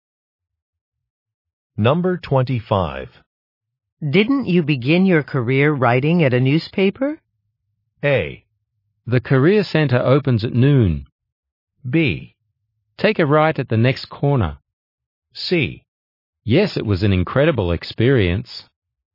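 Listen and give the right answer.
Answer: C: Yes, it was an incredible experience.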